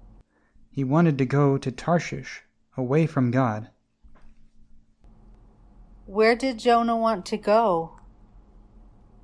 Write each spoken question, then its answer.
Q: Where did Jonah want to go?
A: Jonah wanted to go to Tarshish.